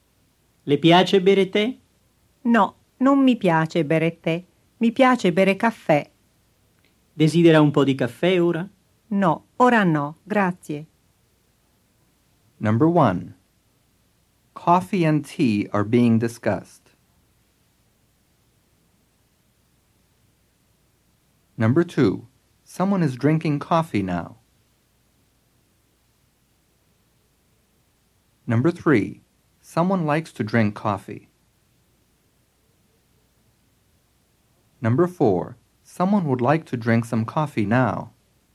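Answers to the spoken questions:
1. True
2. False
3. True
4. False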